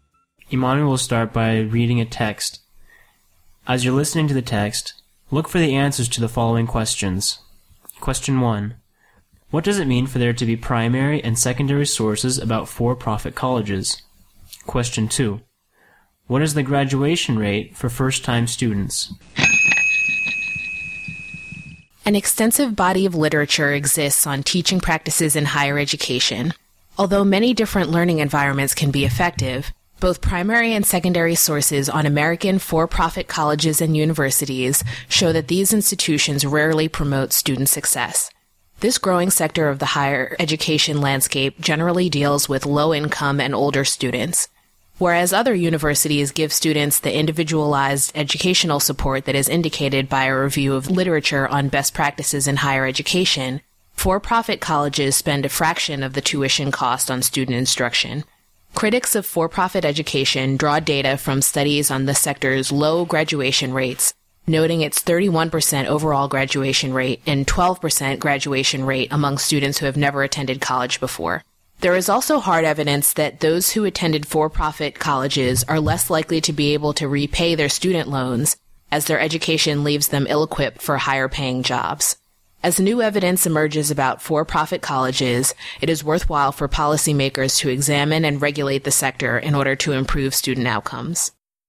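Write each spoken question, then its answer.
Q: What is the graduation rate for first-time students?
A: 12%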